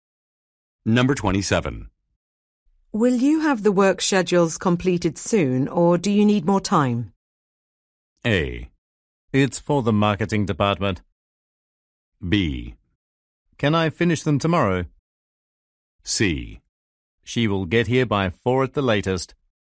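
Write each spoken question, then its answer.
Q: Will you have the work schedules completed soon, or do you need more time?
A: B: Can I finish them tomorrow?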